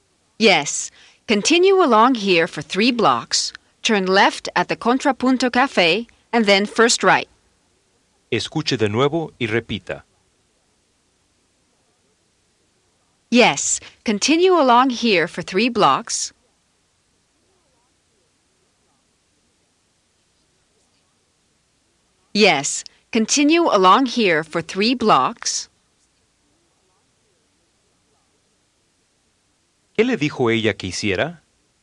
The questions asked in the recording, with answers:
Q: ¿Qué le dijo ella que hiciera?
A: Continue along here for 3 blocks.